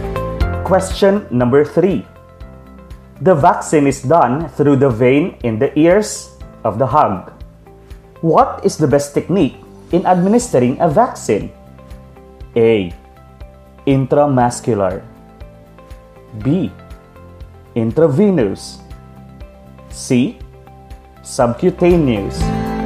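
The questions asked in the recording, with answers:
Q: What is the best technique in administering a vaccine?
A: B: Intravenous.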